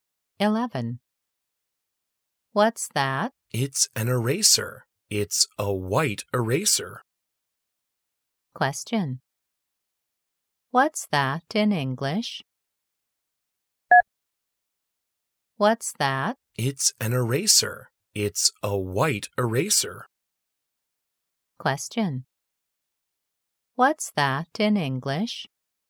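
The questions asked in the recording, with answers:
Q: What's that in English?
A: an eraser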